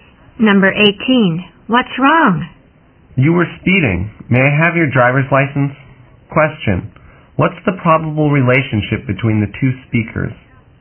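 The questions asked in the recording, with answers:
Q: What's the probable relationship between the two speakers?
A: Driver and police officer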